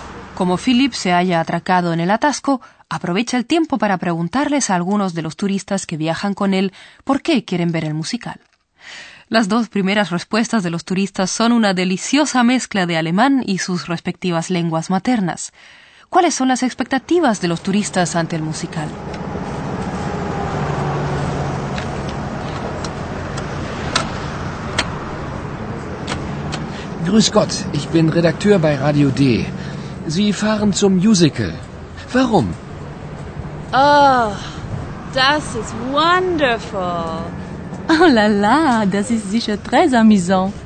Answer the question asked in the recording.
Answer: Las expectativas de los turistas son positivas.